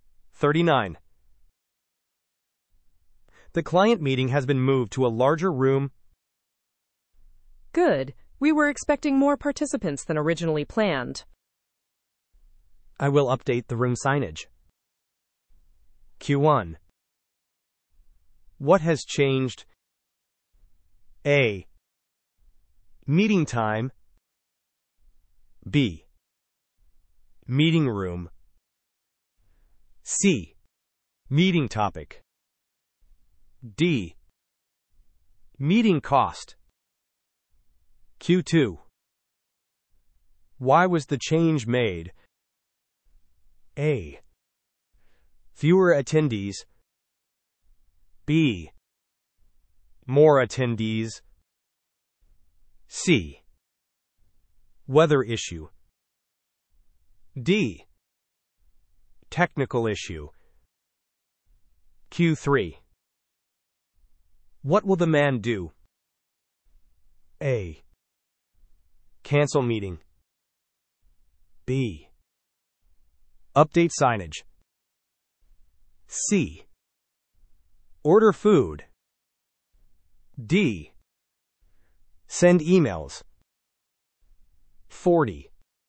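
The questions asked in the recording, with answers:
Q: What has changed?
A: B: Meeting room.

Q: Why was the change made?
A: B: More attendees.

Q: What will the man do?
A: B: Update signage.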